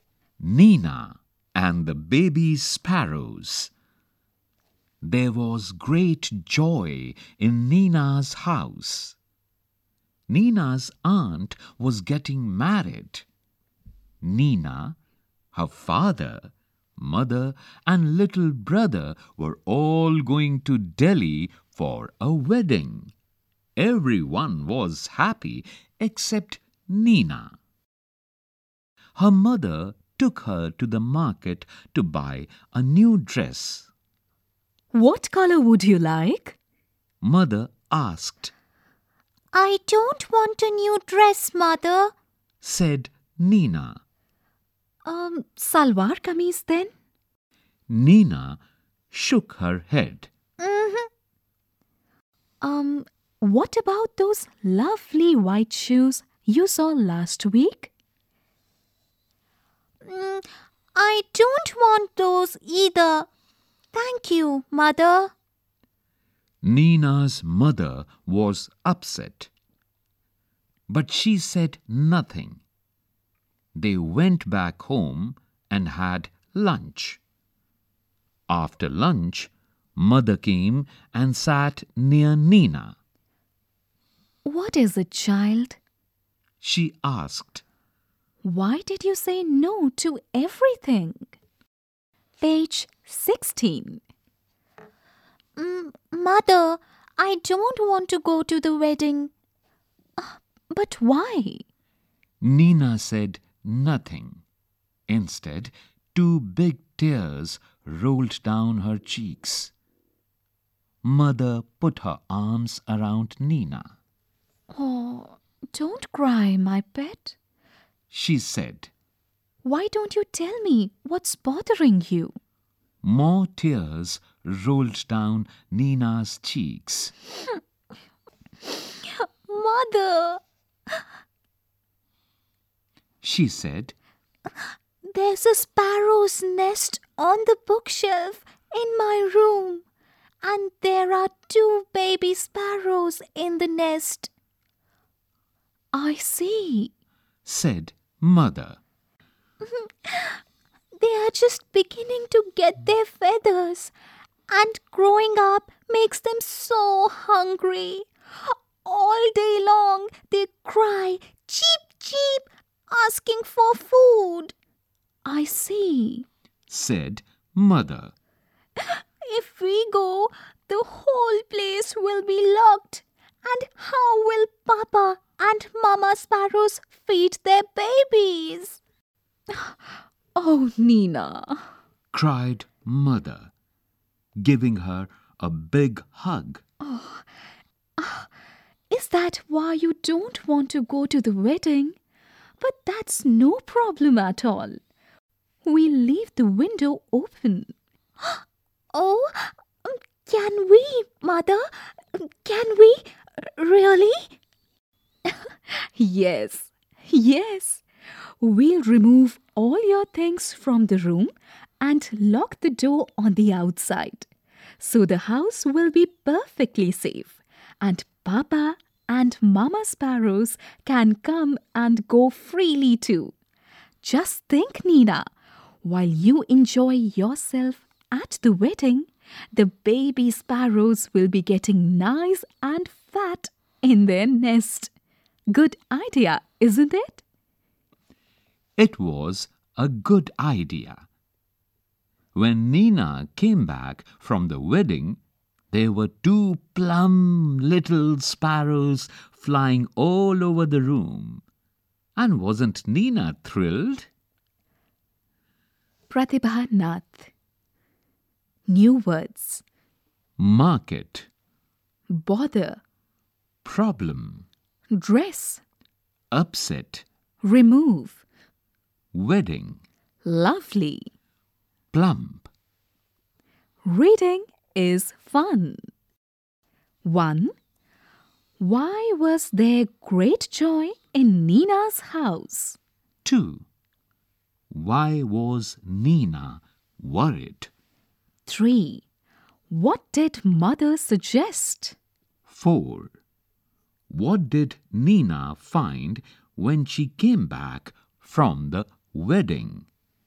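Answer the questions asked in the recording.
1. Nina's aunt was getting married.
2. If they went to the wedding, the house would be locked and the parent sparrows couldn't feed their babies.
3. To leave the window open and lock the room door from outside.
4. Two plump little sparrows flying all over the room.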